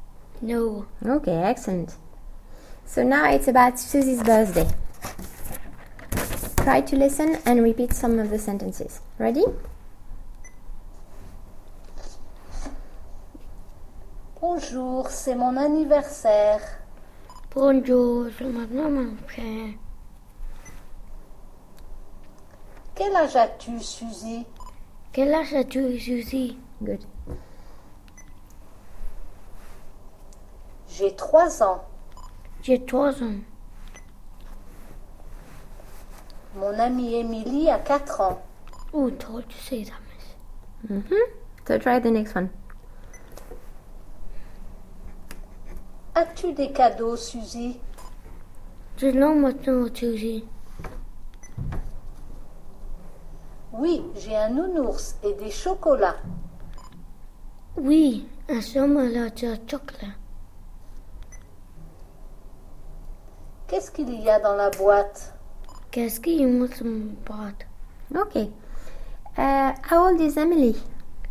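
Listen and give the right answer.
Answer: Four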